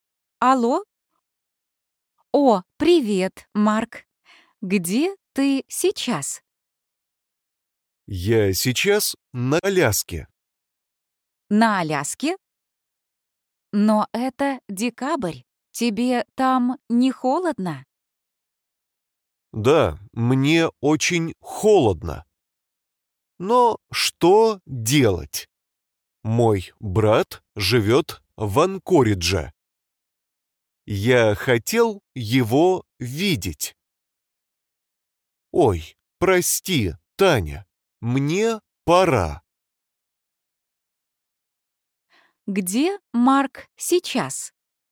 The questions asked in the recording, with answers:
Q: Где Марк сейчас?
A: Он на Аляске.